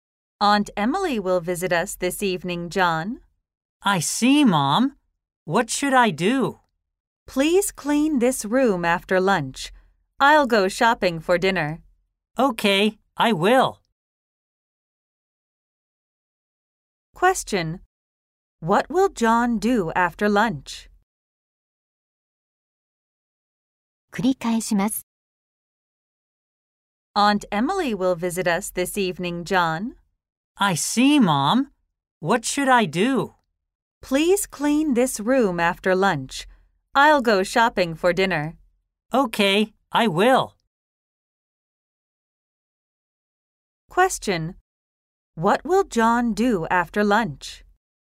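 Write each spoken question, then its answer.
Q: What will John do after lunch?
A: He will clean the room.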